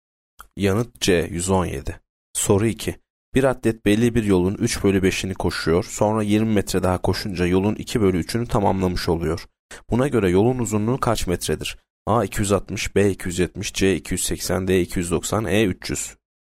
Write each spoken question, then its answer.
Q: Buna göre yolun uzunluğu kaç metredir?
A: Yanıt E 300.